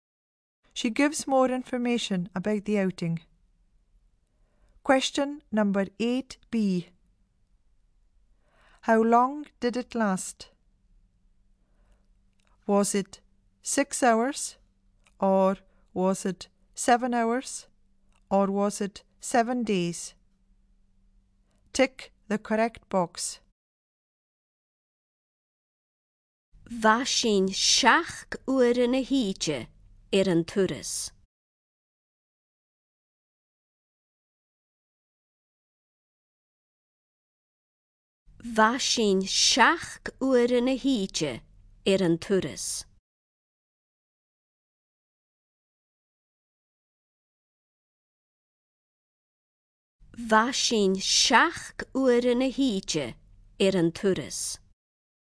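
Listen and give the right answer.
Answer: 7 hours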